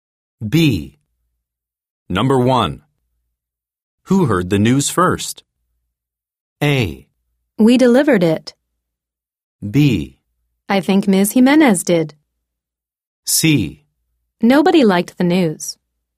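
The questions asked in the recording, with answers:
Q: Who heard the news first?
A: B: I think Ms. Jimenez did.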